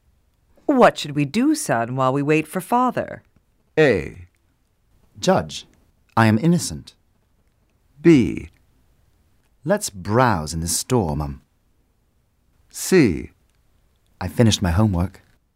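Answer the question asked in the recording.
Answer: B: Let's browse in the store, Mum.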